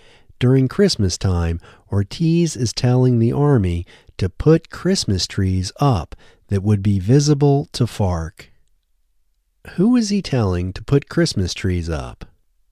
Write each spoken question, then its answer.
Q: Who is he telling to put Christmas trees up?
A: He is telling the Army to put Christmas trees up.